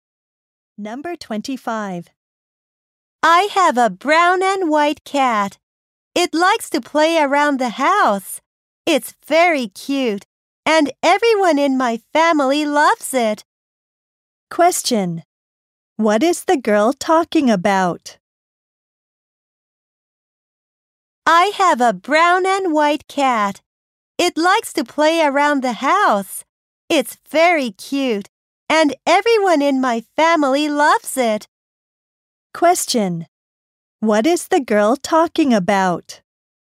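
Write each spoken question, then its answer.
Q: What is the girl talking about?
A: Her cat.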